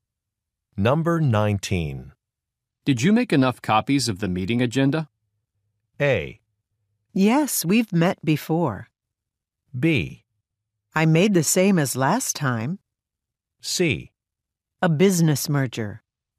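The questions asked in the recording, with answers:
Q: Did you make enough copies of the meeting agenda?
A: B: I made the same as last time.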